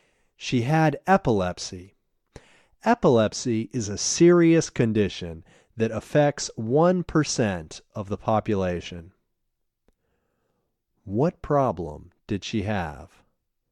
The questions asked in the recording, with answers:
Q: What problem did she have?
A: She had epilepsy.